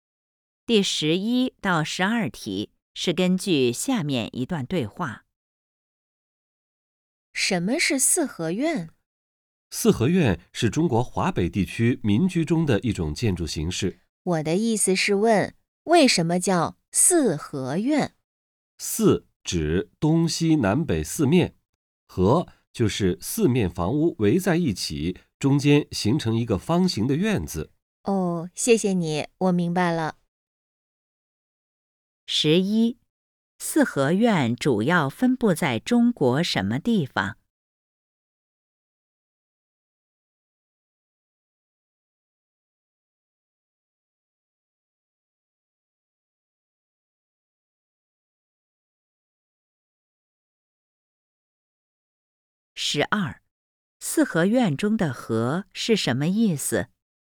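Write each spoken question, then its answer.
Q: 四合院主要分布在中国什么地方?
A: 华北地区

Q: 四合院中的"合"是什么意思?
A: 四面房屋围在一起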